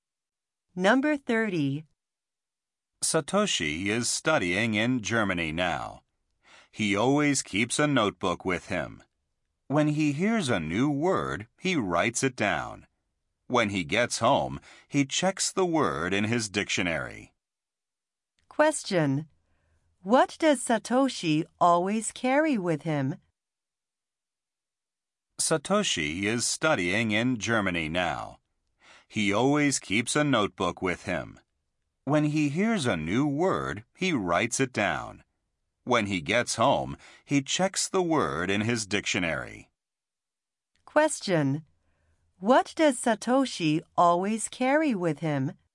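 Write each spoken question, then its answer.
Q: What does Satoshi always carry with him?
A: A notebook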